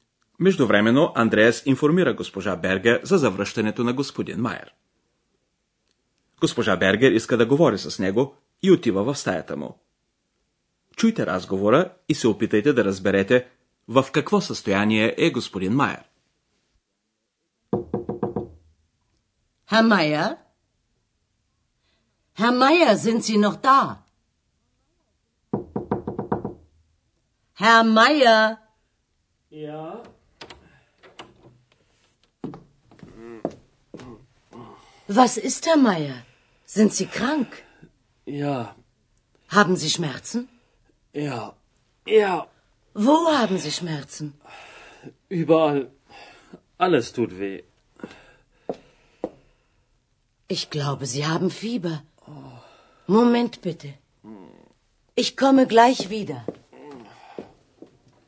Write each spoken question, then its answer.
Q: Чуйте разговора и се опитайте да разберете в какво състояние е господин Майер.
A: Вие сигурно разбрахте от стенанията на господин Майер, че той е болен.